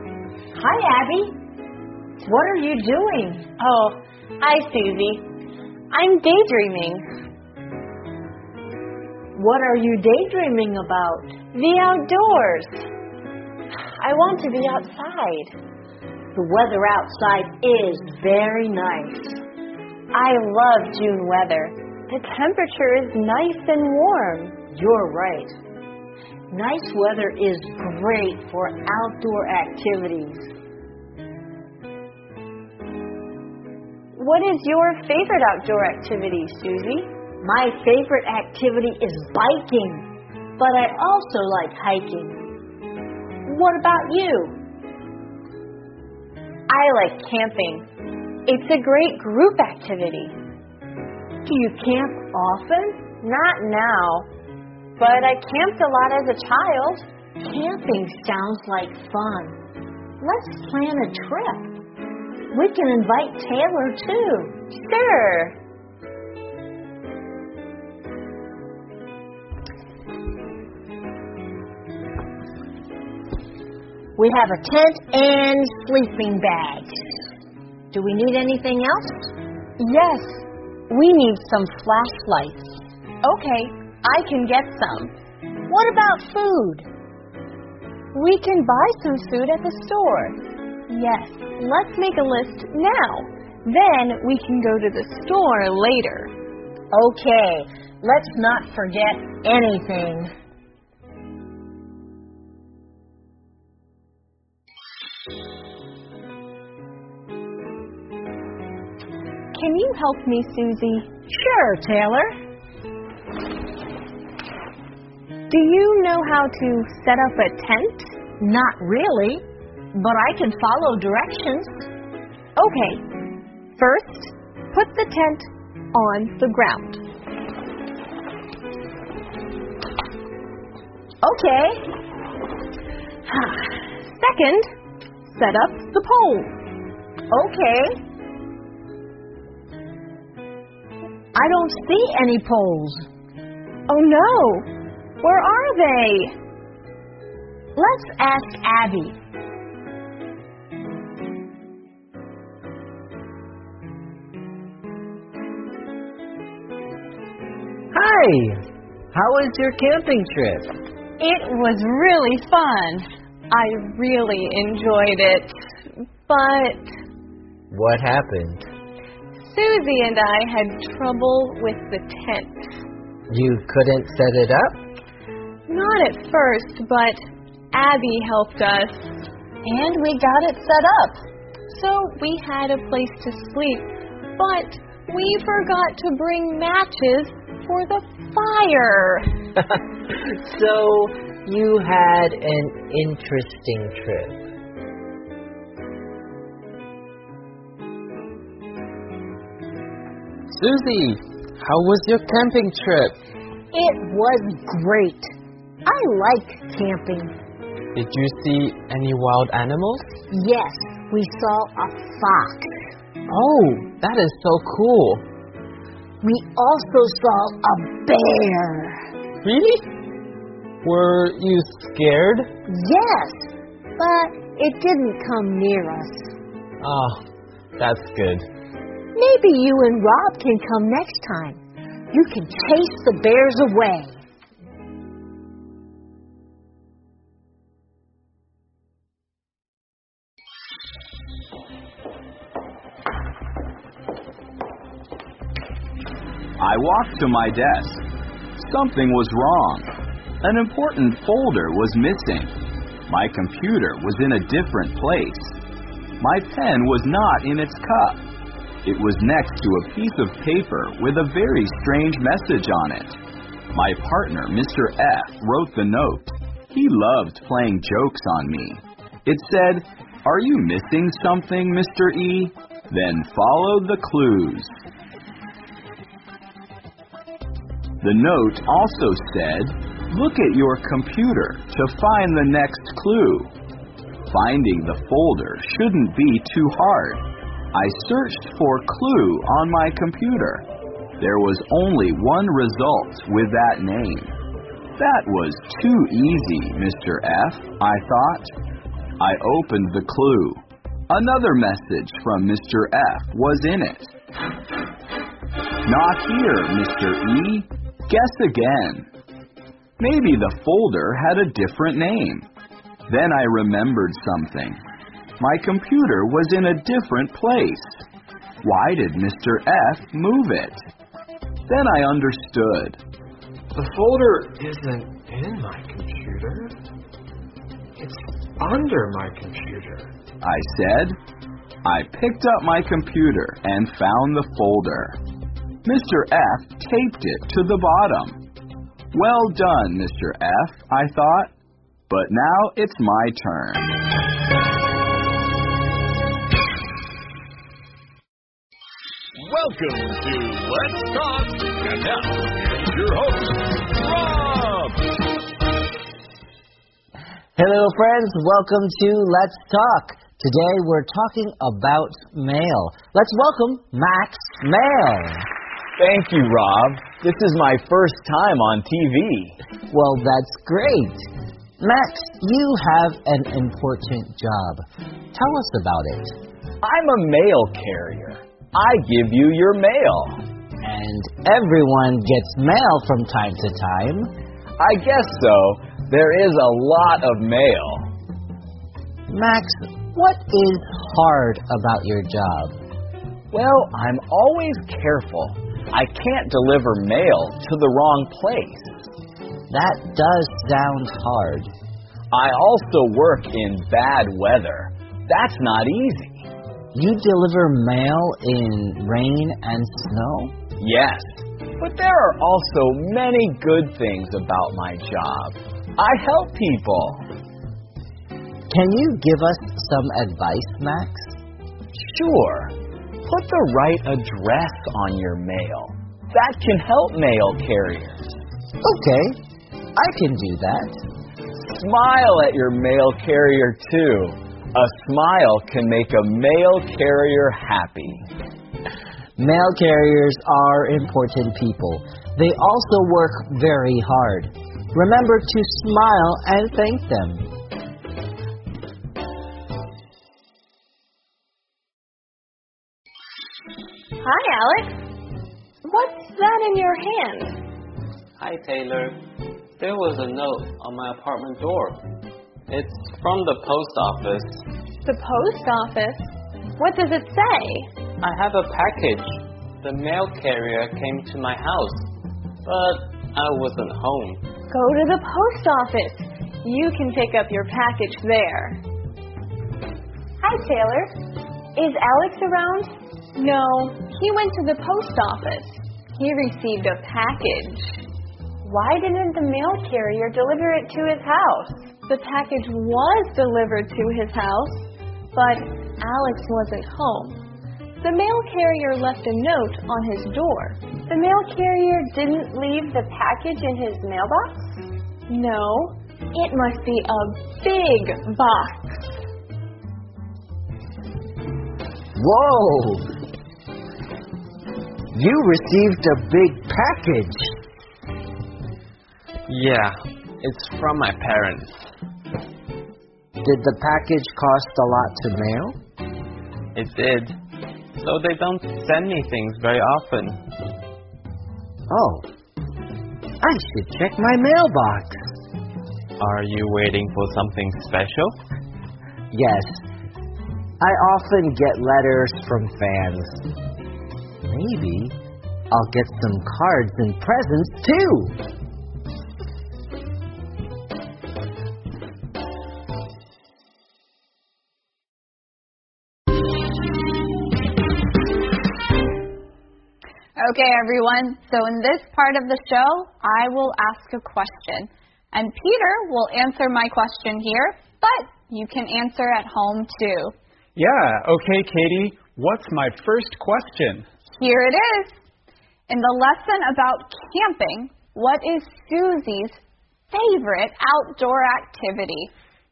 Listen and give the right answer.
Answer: Riding a bike. Susie loves biking.